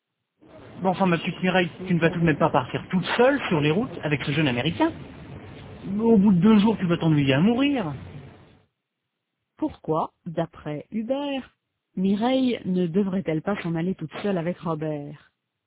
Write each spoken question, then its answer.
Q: Pourquoi, d'après Hubert, Mireille ne devrait-elle pas s'en aller toute seule avec Robert?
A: Parce qu'au bout de 2 jours, elle va s'ennuyer à mourir.